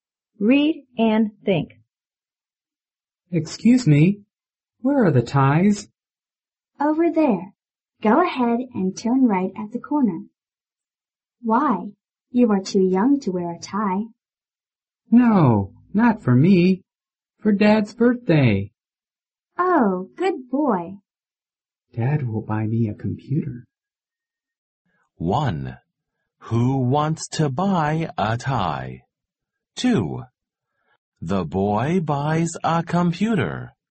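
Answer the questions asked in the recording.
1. The boy
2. False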